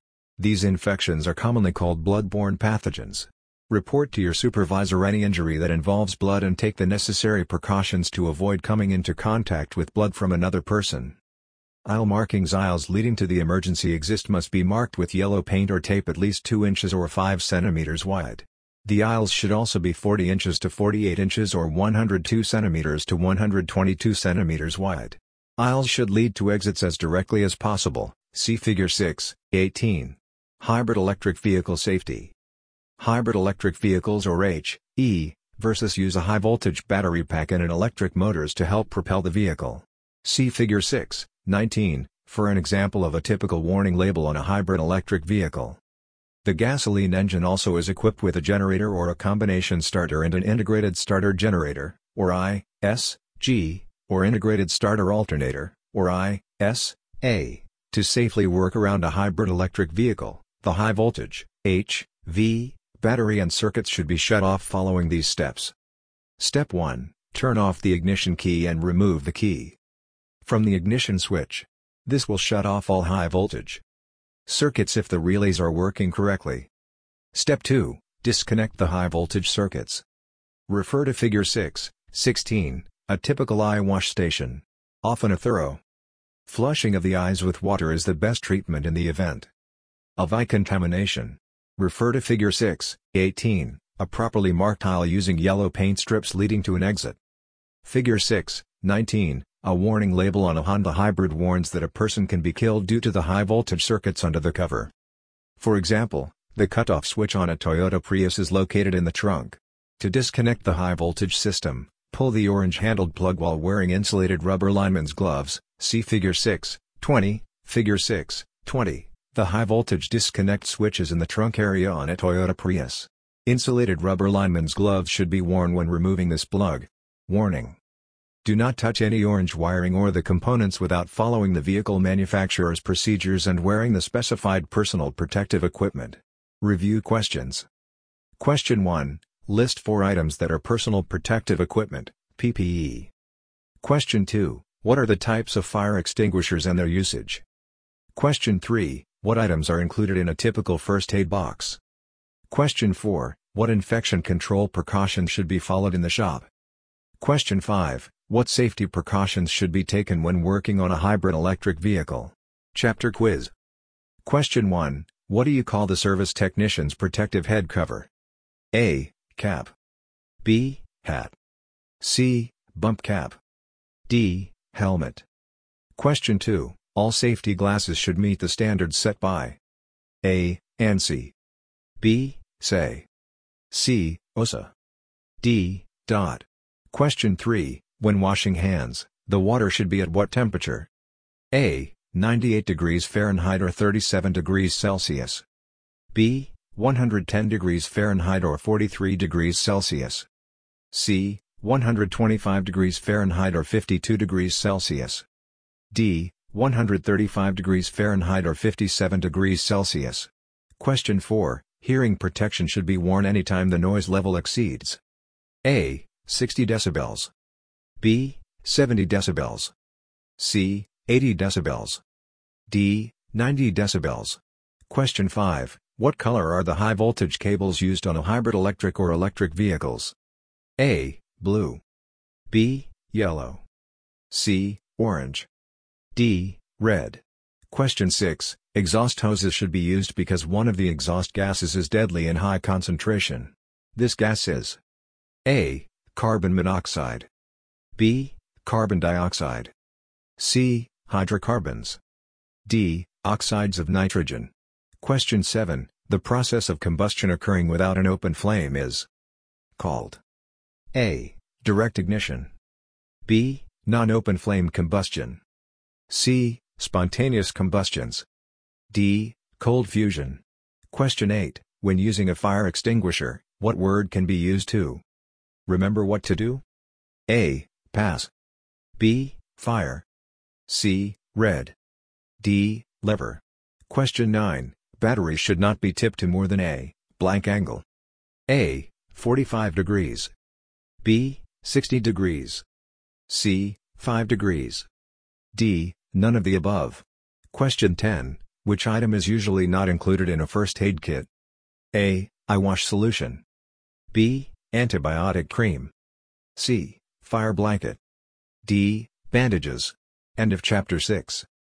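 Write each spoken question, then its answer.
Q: What color are the high voltage cables used on a hybrid electric or electric vehicles?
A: C: Orange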